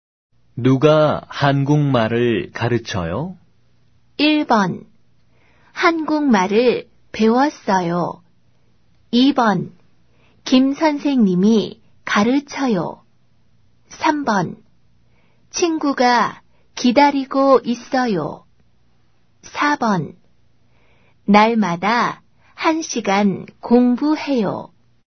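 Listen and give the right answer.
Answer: 2: 김 선생님이 가르쳐요.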